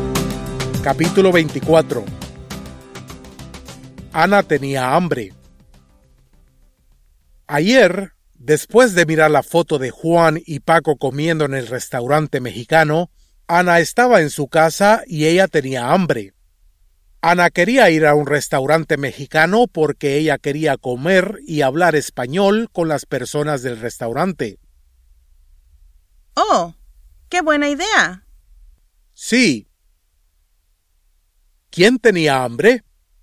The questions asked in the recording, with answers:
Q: ¿Quién tenía hambre?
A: Ana tenía hambre.